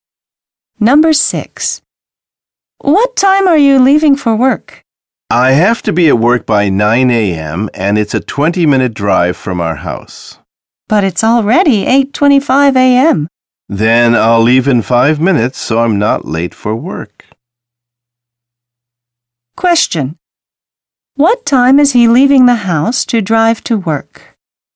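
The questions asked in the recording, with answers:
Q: What time is he leaving the house to drive to work?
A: At 8:30 a.m.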